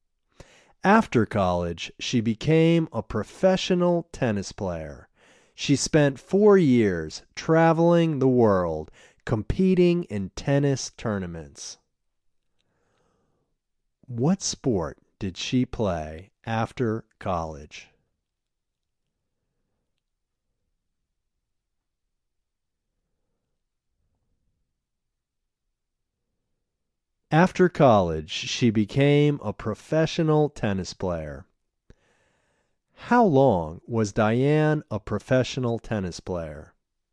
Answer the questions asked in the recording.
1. After college, she became a professional tennis player.
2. Diane was a professional tennis player for 4 years.